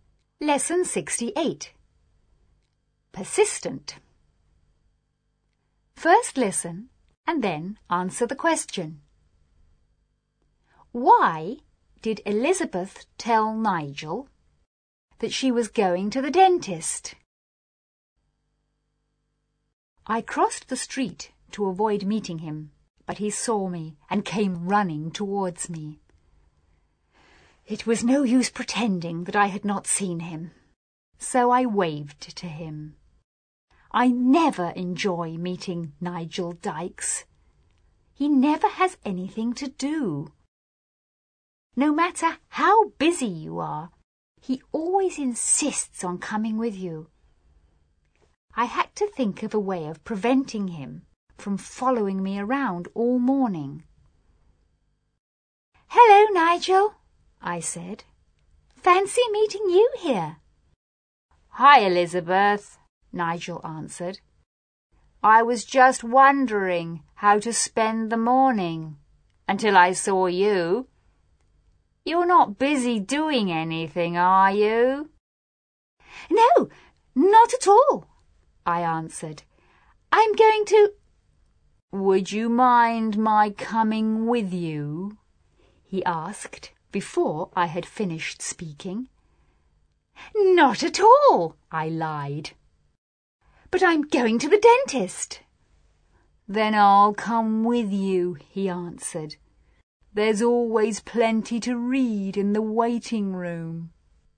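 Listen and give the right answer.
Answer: To stop him from following her around all morning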